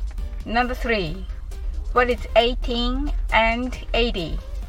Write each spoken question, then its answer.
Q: What is 18 and 80?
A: The answer is 98.